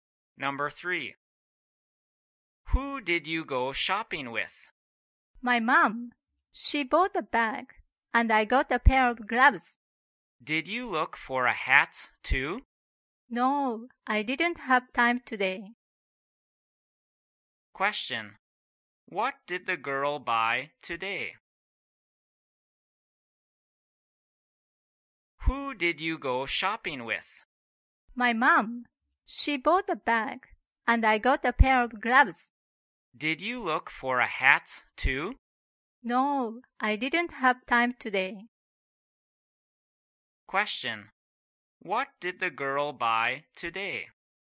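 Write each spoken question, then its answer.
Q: What did the girl buy today?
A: A pair of gloves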